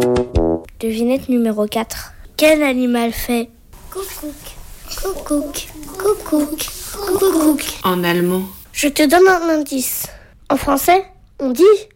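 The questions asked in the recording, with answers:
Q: Quel animal fait ?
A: le coucou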